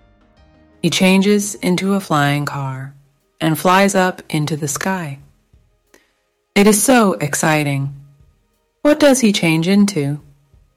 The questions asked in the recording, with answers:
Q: What does he change into?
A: Into a flying car. He changes into a flying car.